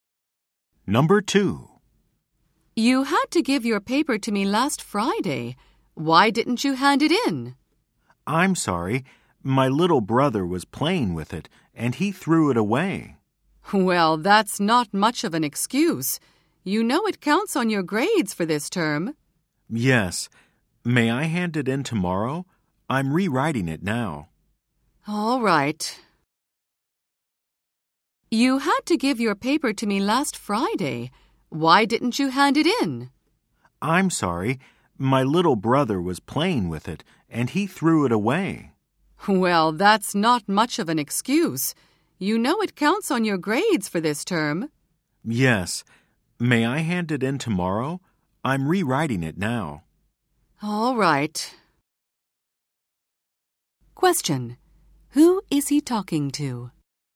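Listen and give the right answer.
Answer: His teacher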